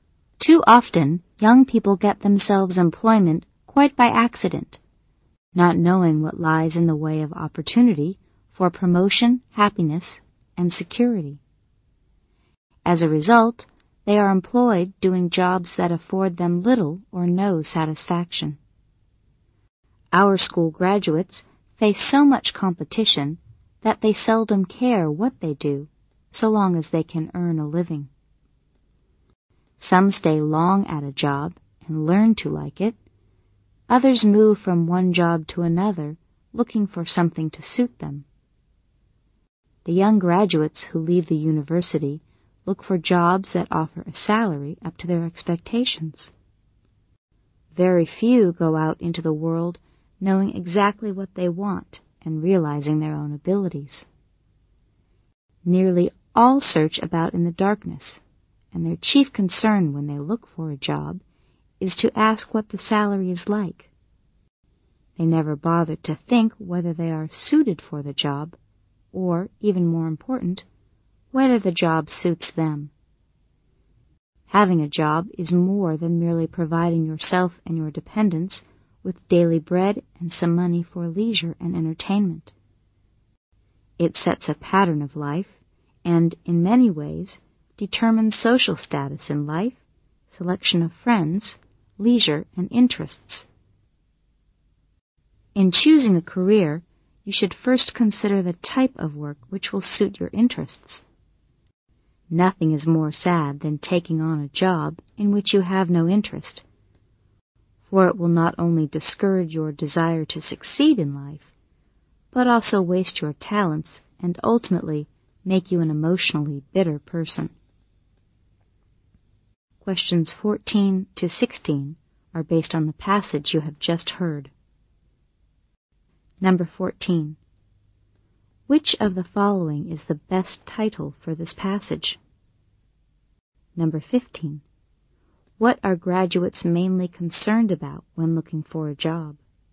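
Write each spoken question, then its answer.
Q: What are graduates mainly concerned about when looking for a job?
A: The salary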